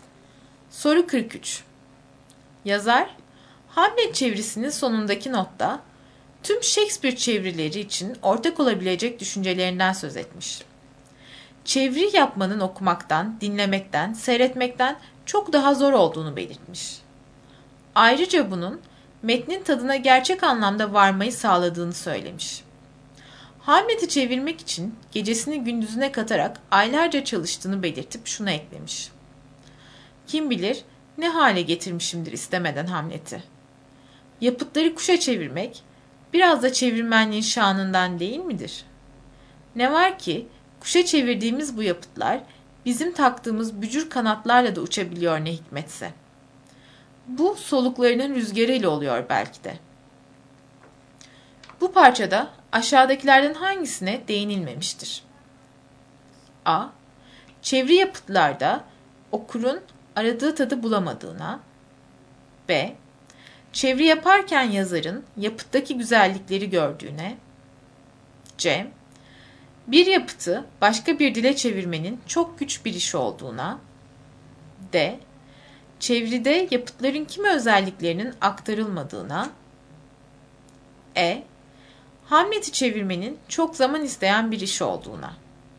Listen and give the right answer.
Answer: Doğru cevap A.